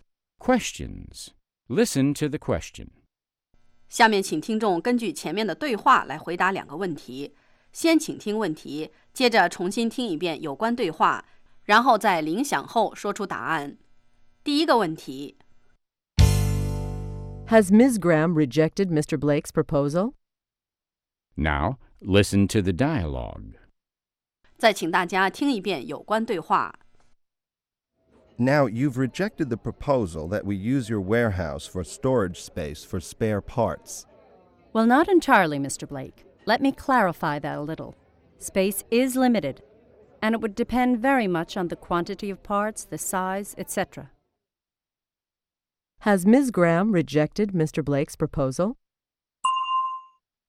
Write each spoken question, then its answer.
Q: Has Ms. Graham rejected Mr. Blake's proposal?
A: No, she hasn't. She is still willing to consider it.